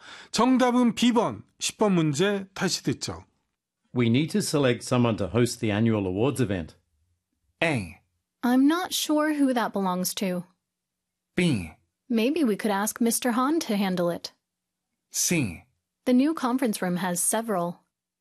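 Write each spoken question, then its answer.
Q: We need to select someone to host the annual awards event.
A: B: Maybe we could ask Mr. Han to handle it.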